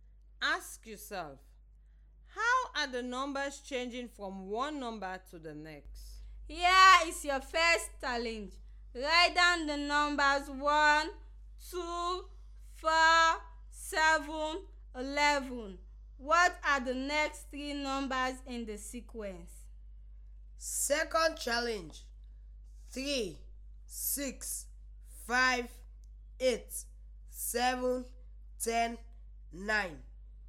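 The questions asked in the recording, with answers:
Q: What are the next three numbers in the sequence?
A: 16, 22, 29

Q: What are the next three numbers in the sequence?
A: 12, 11, 14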